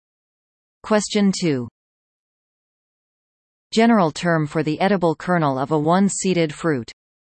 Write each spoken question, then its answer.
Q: General term for the edible kernel of a one-seeded fruit.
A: Answer a nut.